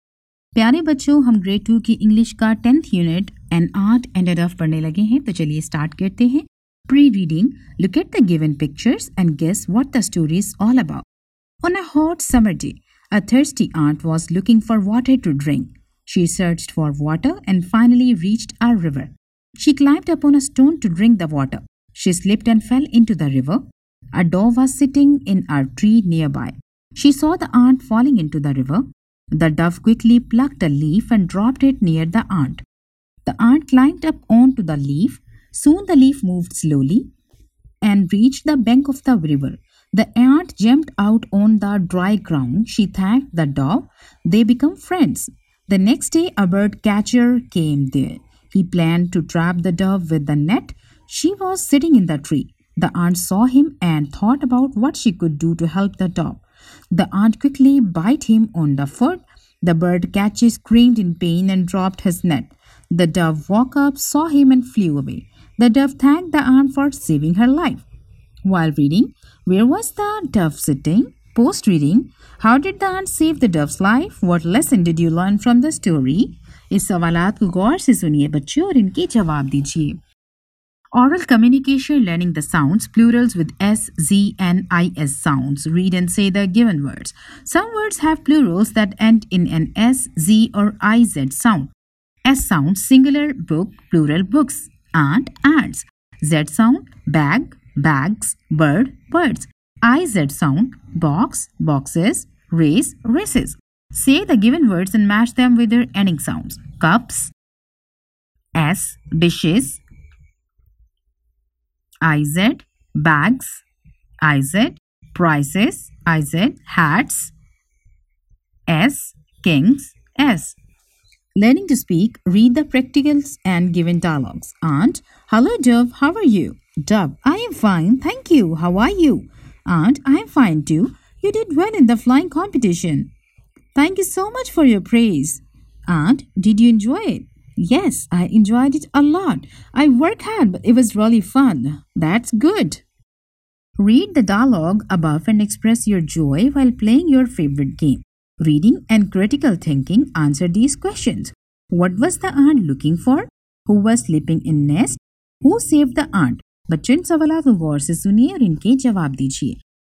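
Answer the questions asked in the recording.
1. In a tree near the river
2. She bit the bird catcher on the foot, so he dropped his net
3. Water to drink
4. The dove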